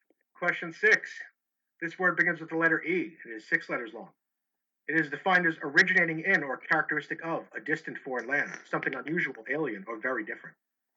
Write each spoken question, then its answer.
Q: This word begins with the letter E.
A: That is exotic.